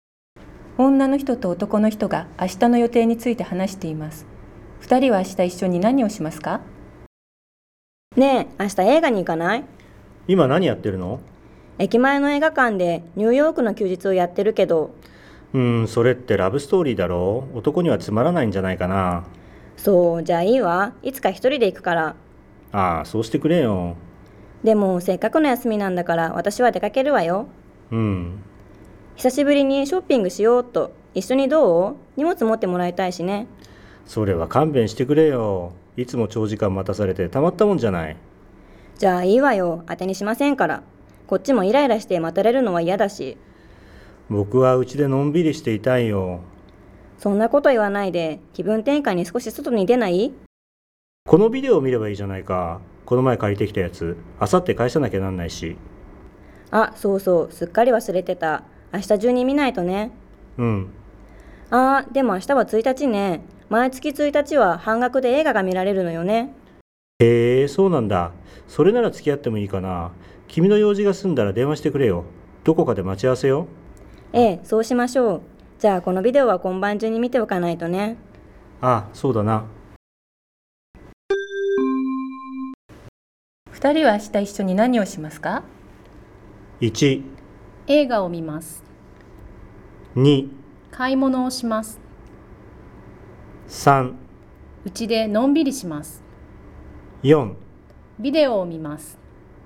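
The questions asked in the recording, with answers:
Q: 二人は明日一緒に何をしますか?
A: 1: 映画を見ます。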